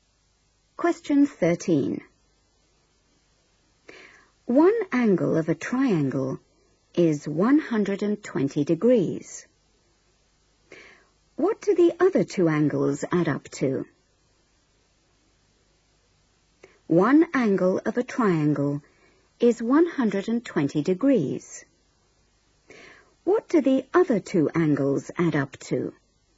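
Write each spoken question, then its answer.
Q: What do the other two angles add up to?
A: 60 degrees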